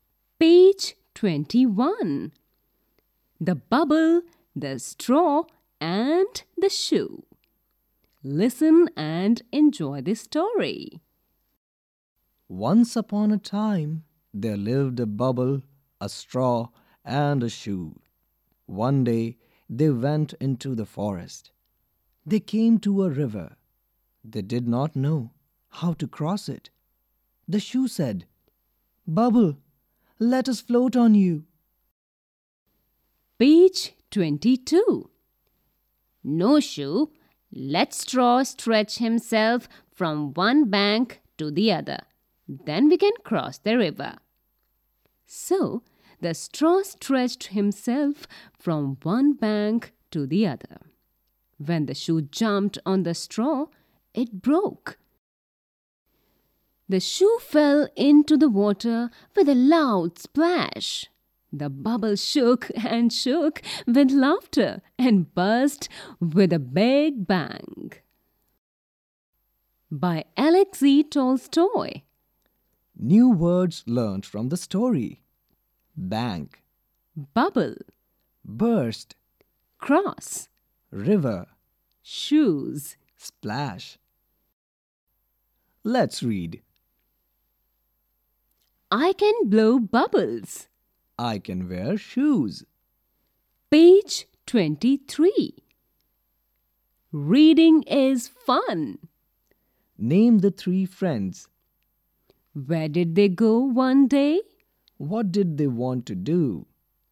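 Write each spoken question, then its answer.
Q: Name the three friends.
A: A bubble, a straw, and a shoe

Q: Where did they go one day?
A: Into the forest

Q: What did they want to do?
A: Cross the river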